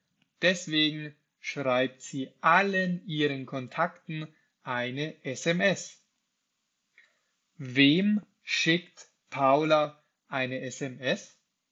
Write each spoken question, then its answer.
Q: Wem schickt Paula eine SMS?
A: Allen ihren Kontakten. Sie schickt allen ihren Kontakten eine SMS.